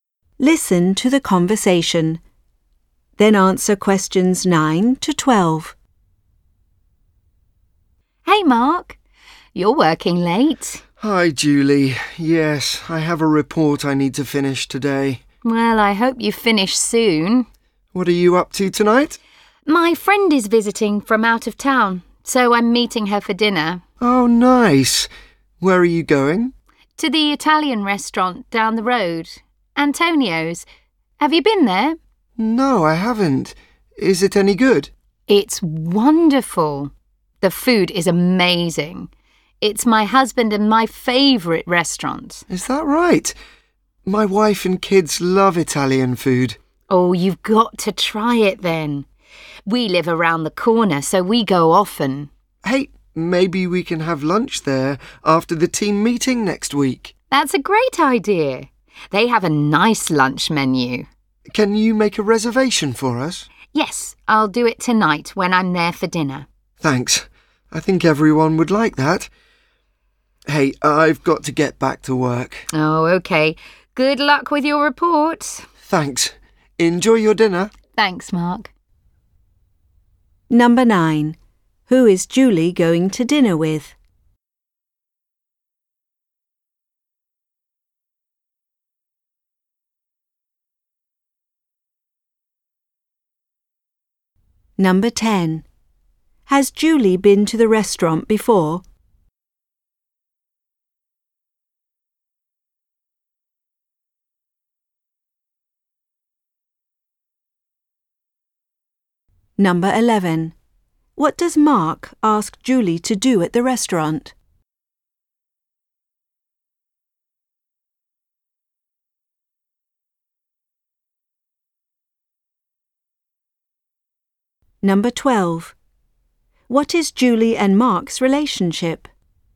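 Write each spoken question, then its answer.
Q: Who is Julie going to dinner with?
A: A friend visiting from out of town

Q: Has Julie been to the restaurant before?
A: Yes, she goes often

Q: What does Mark ask Julie to do at the restaurant?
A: Make a reservation for lunch

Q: What is Julie and Mark's relationship?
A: They are coworkers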